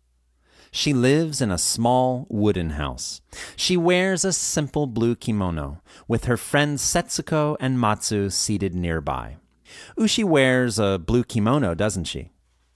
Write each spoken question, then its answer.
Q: Ushi wears a blue kimono, doesn't she?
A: Yes, she does. She wears a simple blue kimono.